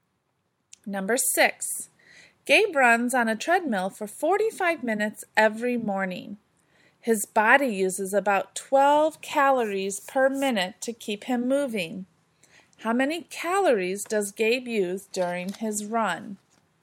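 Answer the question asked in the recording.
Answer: 540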